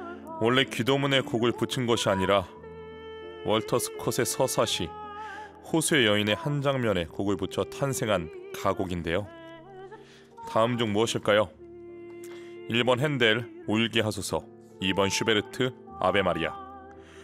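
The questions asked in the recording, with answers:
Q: 다음 중 무엇일까요? 1번 핸델 울게 하소서, 2번 슈베르트 아베 마리아.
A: 2: 슈베르트 아베 마리아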